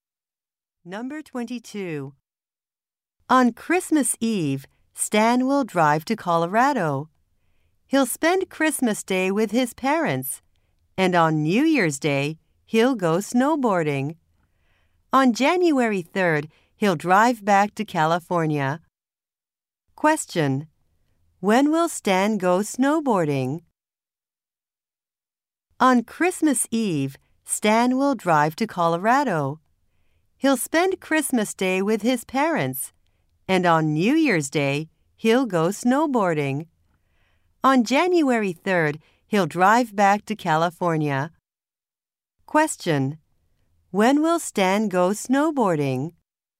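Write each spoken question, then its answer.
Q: When will Stan go snowboarding?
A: On New Year's Day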